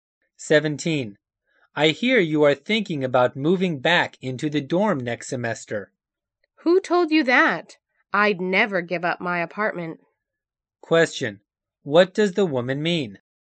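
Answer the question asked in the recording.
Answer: She won't move back into the dorm.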